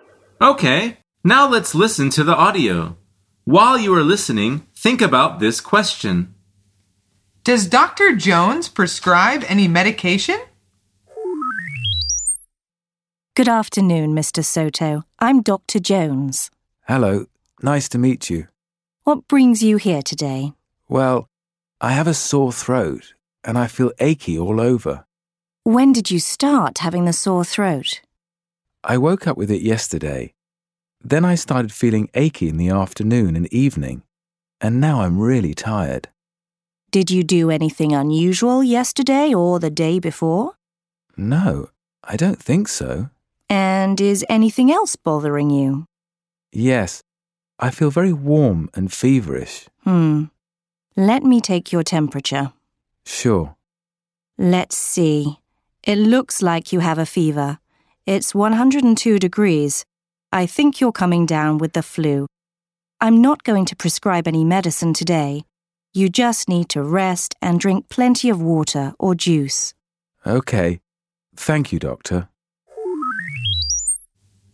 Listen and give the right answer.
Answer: The answer is no. She says the man just needs to rest.